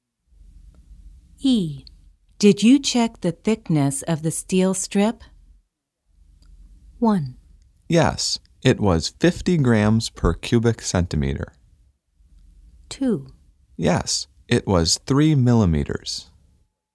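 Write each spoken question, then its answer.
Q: Did you check the thickness of the steel strip?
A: 2: Yes, it was 3 millimeters.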